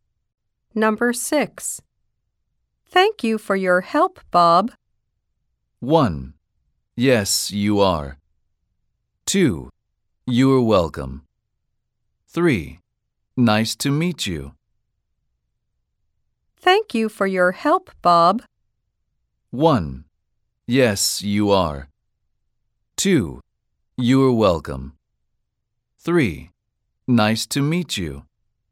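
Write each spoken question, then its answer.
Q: Thank you for your help, Bob.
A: 2: You're welcome.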